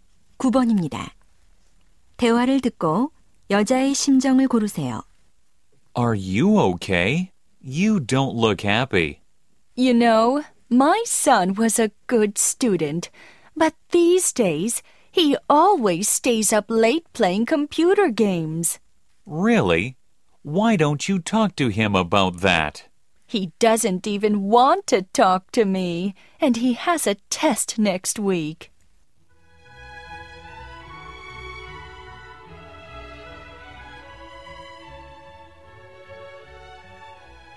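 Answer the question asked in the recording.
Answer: 걱정스러움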